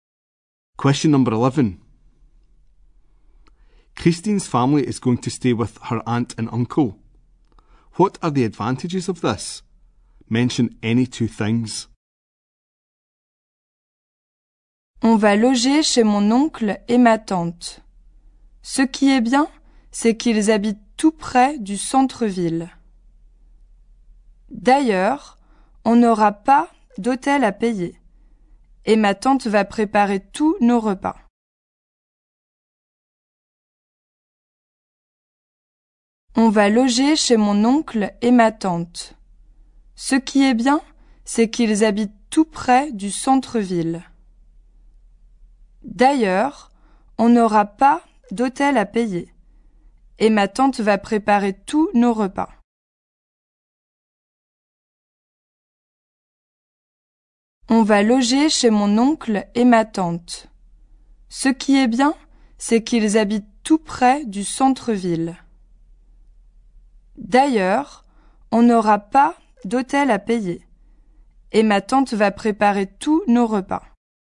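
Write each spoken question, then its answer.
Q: What are the advantages of this?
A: They live very near the town centre; no hotel to pay for; aunt will cook all their meals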